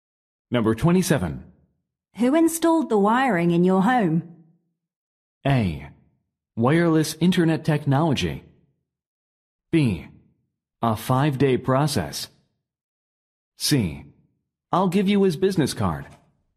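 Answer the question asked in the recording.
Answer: C: I'll give you his business card.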